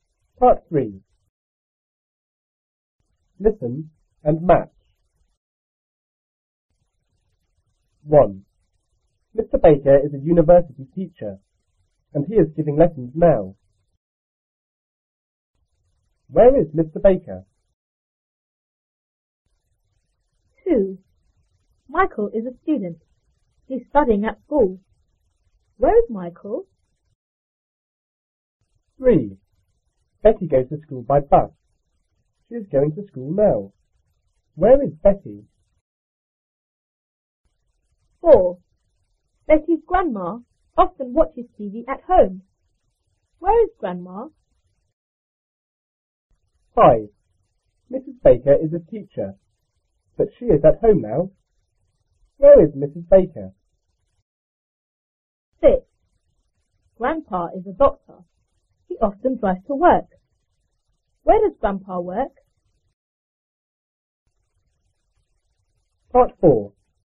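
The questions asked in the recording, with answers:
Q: Where is Mr. Baker?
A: At the university

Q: Where is Michael?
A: At school

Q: Where is Betty?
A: On the bus

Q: Where is grandma?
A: At home

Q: Where is Mrs. Baker?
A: At home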